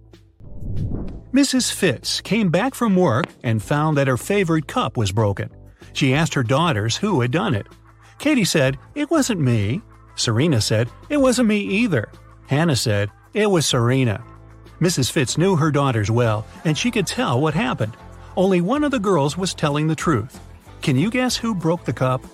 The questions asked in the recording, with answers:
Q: Can you guess who broke the cup?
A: So Serena is the honest girl, and Katie is the guilty one.